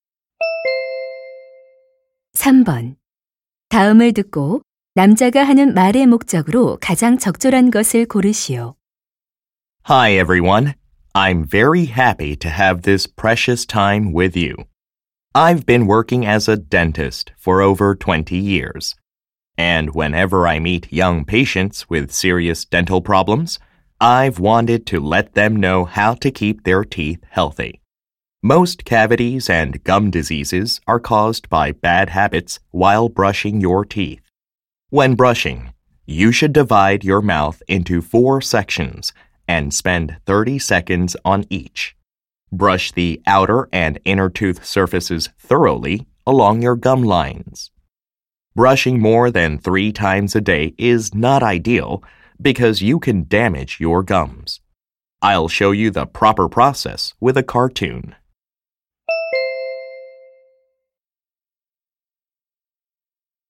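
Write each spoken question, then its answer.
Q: 다음을 듣고 남자가 하는 말의 목적으로 가장 적절한 것을 고르시오.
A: 올바른 양치질 방법을 알려 주려고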